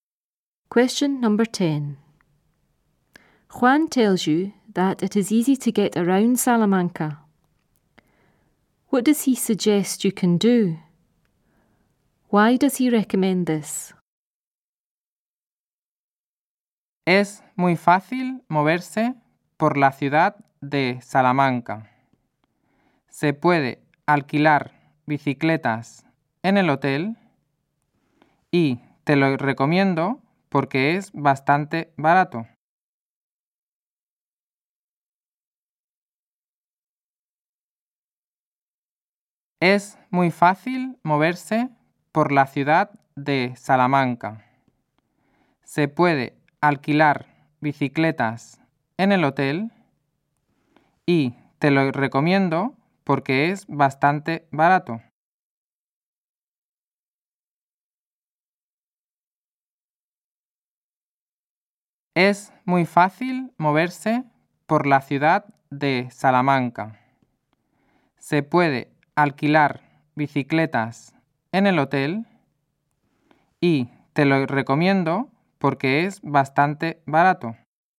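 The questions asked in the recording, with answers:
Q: What does he suggest you can do?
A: Hire bikes at the hotel

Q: Why does he recommend this?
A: It is quite cheap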